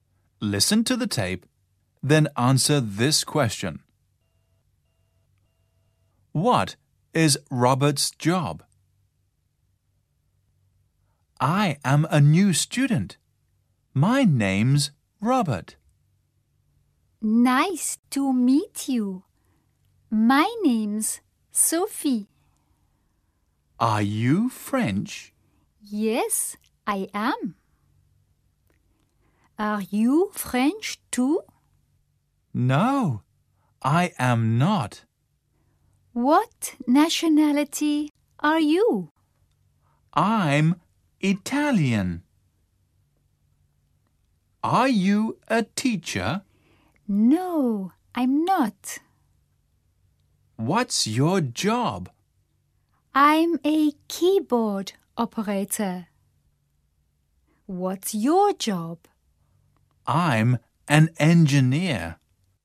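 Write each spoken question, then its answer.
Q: What is Robert's job?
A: He's an engineer.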